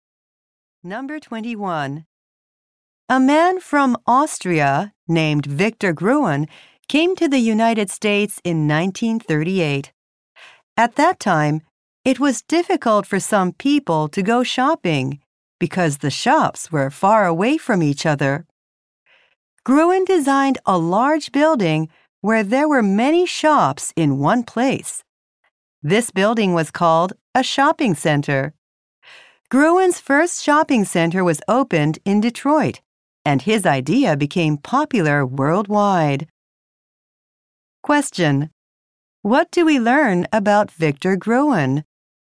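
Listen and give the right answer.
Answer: He designed the shopping center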